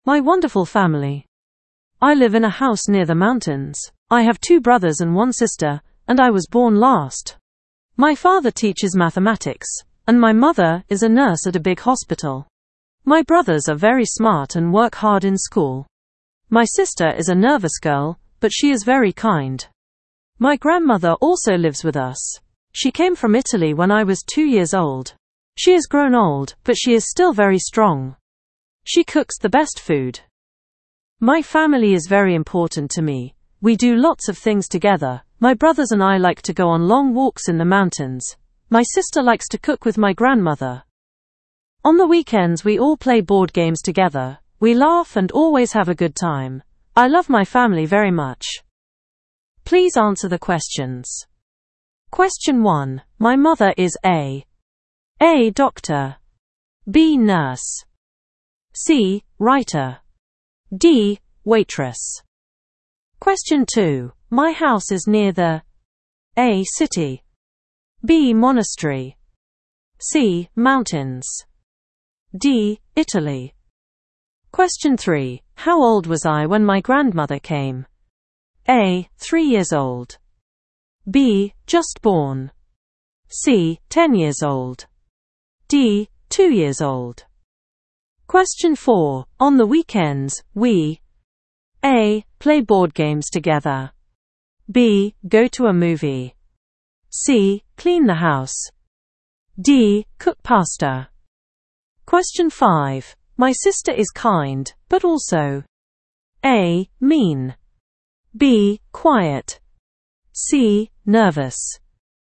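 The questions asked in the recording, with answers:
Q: My mother is A.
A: B: Nurse

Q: My house is near the A.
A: C: Mountains

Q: How old was I when my grandmother came?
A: D: 2 years old

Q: On the weekends, we A.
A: A: Play board games together

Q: My sister is kind, but also A.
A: C: Nervous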